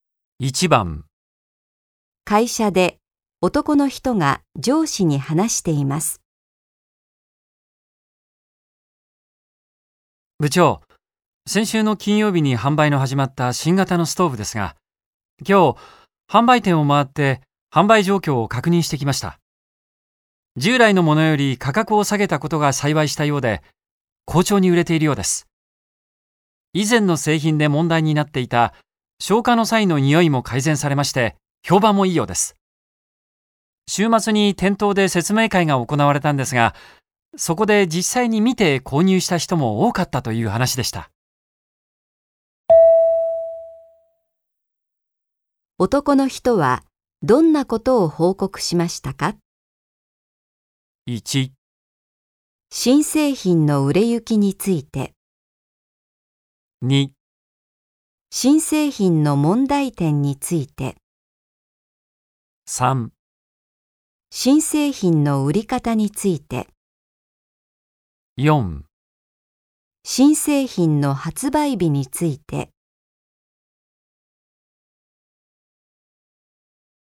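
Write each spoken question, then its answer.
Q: 男の人はどんなことを報告しましたか?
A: 1: 新製品の売れ行きについて。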